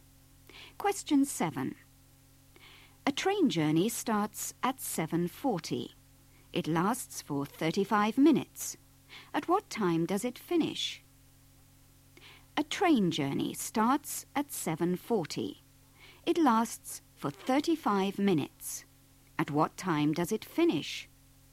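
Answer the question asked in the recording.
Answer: 8:15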